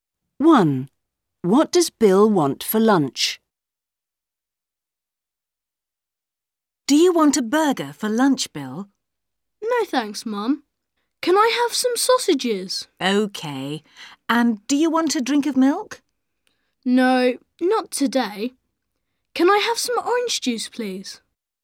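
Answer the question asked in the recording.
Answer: Sausages and orange juice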